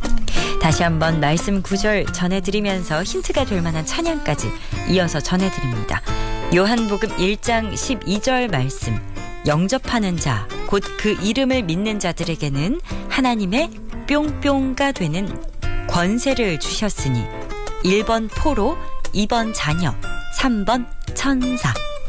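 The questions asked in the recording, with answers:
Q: 요한복음 1장 12절 말씀, 영접하는 자, 곧 그 이름을 믿는 자들에게는 하나님의 뿅뿅가 되는 권세를 주셨으니, 1번 포로, 2번 자녀, 3번 천사.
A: 2: 자녀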